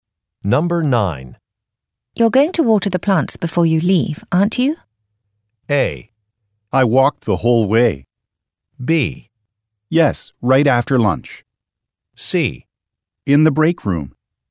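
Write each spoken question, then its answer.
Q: You're going to water the plants before you leave, aren't you?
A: B: Yes, right after lunch.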